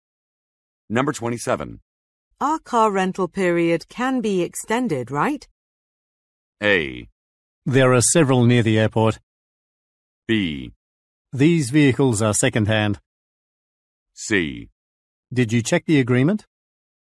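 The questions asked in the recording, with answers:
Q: Our car rental period can be extended, right?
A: C: Did you check the agreement?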